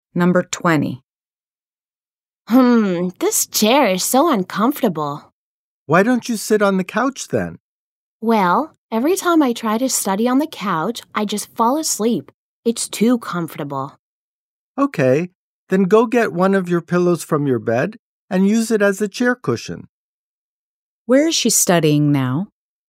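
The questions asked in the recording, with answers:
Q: Where is she studying now?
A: In an uncomfortable chair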